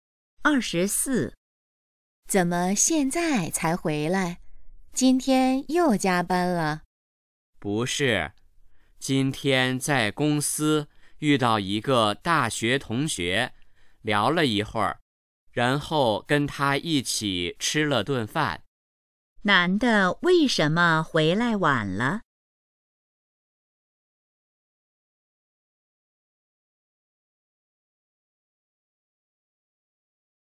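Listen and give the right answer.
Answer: 遇到大学同学,聊天并一起吃饭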